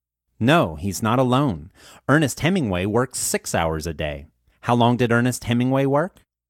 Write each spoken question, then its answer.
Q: How long did Ernest Hemingway work?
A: Ernest Hemingway worked 6 hours a day.